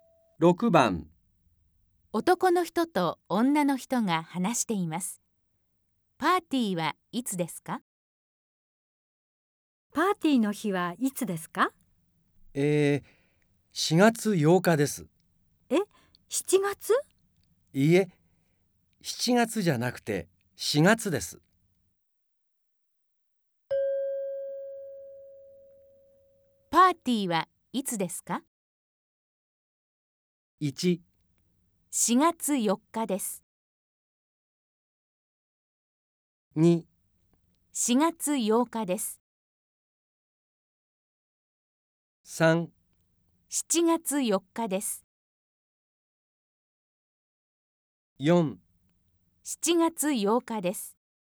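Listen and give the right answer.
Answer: 2: 4月8日です。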